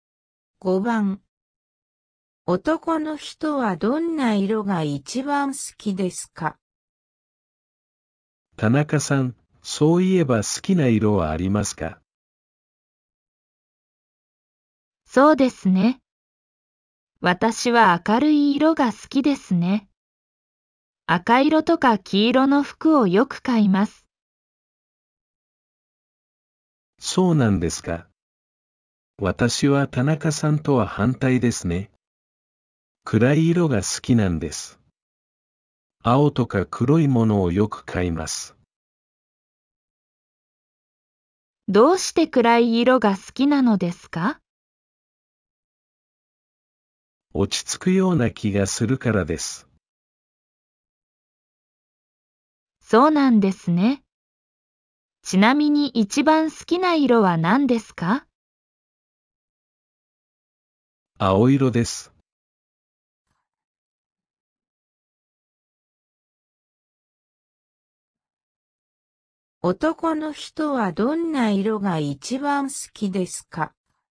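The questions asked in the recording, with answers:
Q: 男の人はどんな色が一番好きですか?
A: 青色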